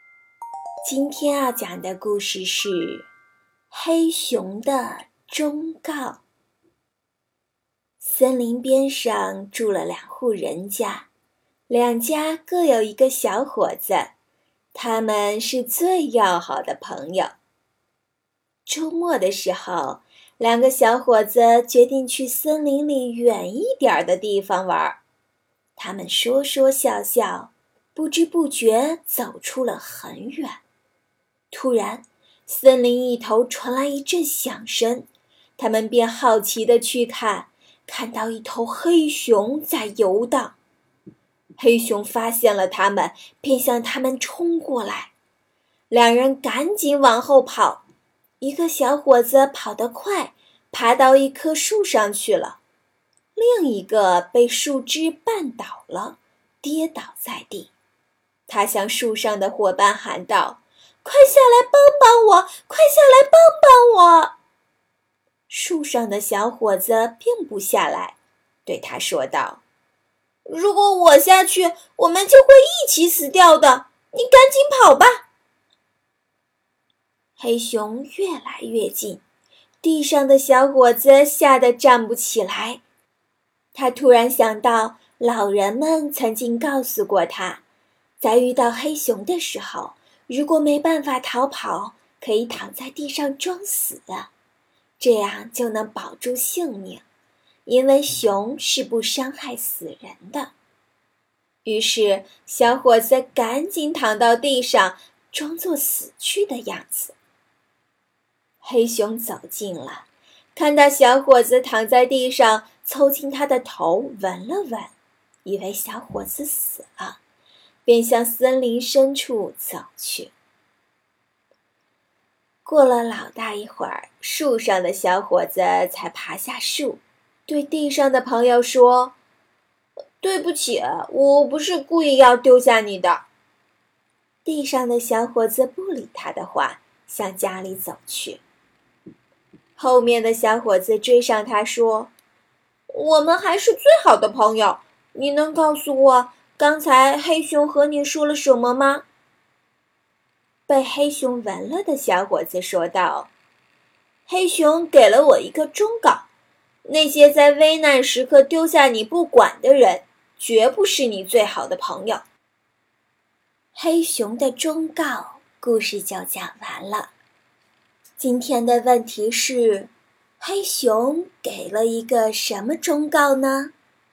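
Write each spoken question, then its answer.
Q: 今天的问题是,黑熊给了一个什么忠告呢?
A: 那些在危难时刻丢下你不管的人,绝不是你最好的朋友。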